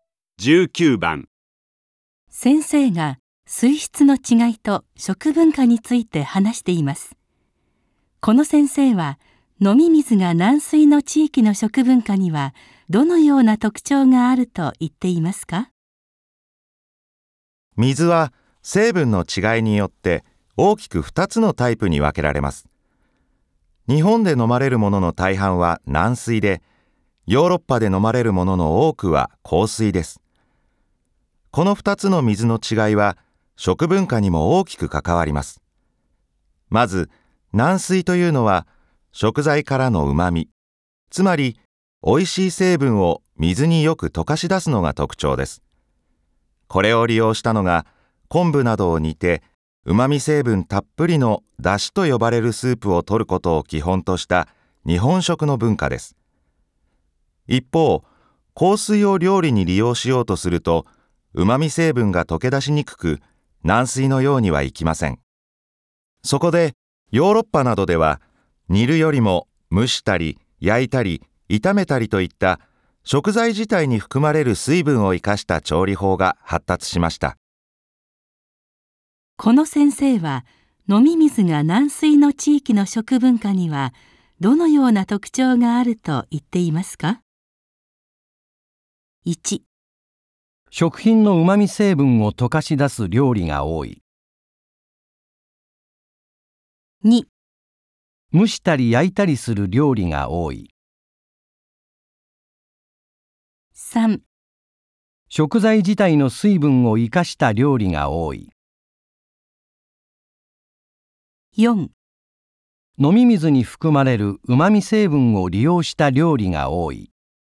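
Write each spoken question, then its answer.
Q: この先生は飲み水が軟水の地域の食文化にはどのような特徴があると言っていますか?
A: 1: 食品のうまみ成分を溶かし出す料理が多い。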